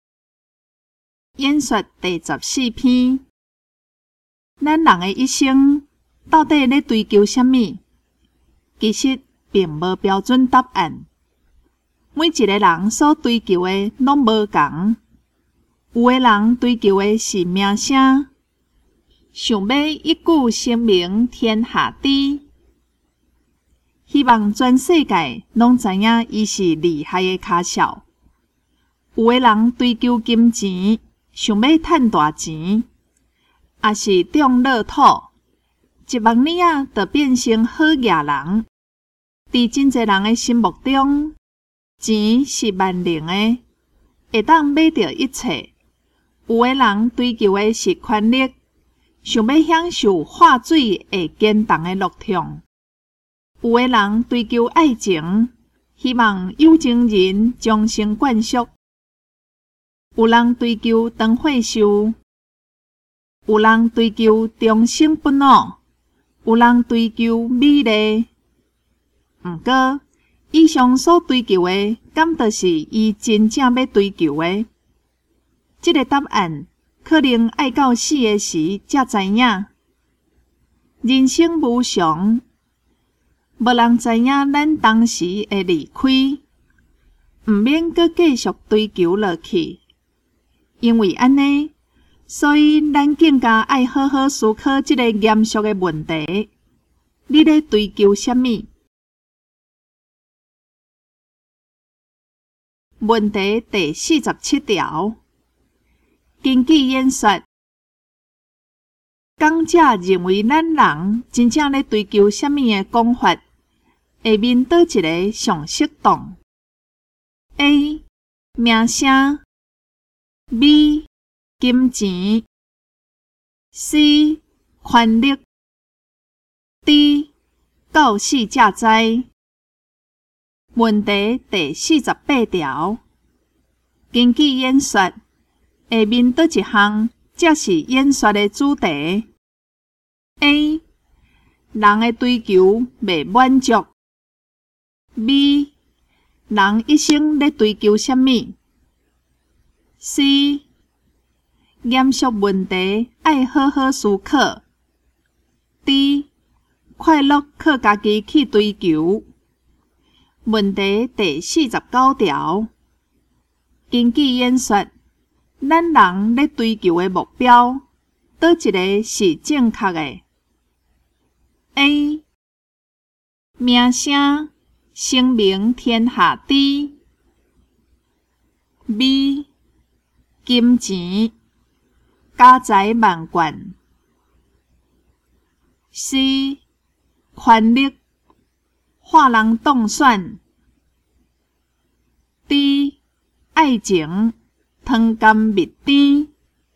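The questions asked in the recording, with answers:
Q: 根据演说,讲者认为咱人真正咧追求什么的讲法,下面倒一个上适当 ?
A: D: 到死才知

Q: 根据演说,下面倒一项才是演说的主题 ?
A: B: 人一生咧追求什么?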